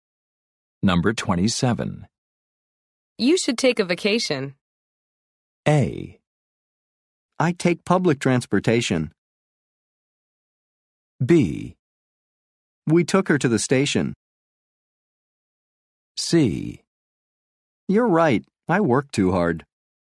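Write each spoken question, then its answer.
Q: You should take a vacation.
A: C: You're right. I work too hard.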